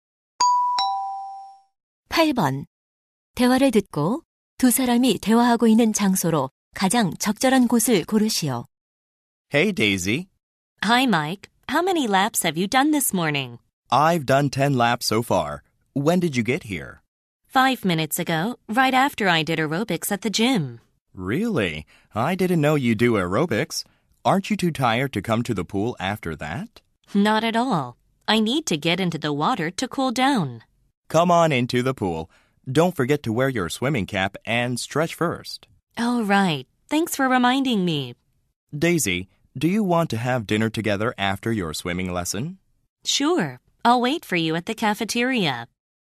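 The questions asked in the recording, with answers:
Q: 대화를 듣고 두 사람이 대화하고 있는 장소로 가장 적절한 곳을 고르시오.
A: 수영장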